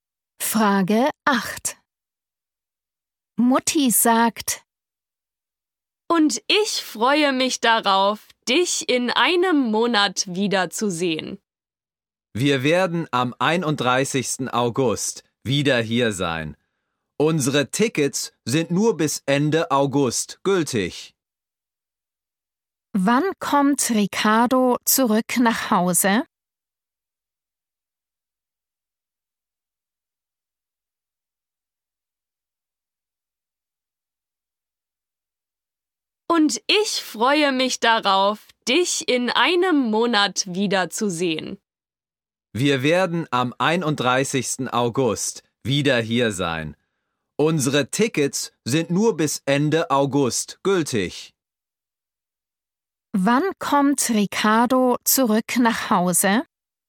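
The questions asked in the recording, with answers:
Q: Wann kommt Ricardo zurück nach Hause?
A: am 31. August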